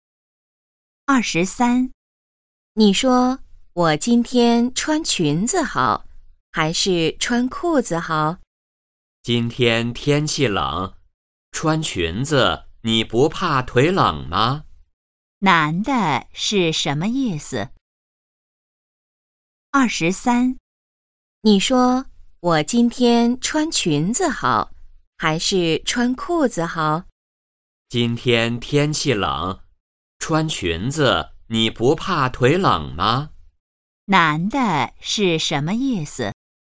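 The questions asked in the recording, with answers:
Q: 男的是什么意思?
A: 天气冷,最好穿裤子,不要穿裙子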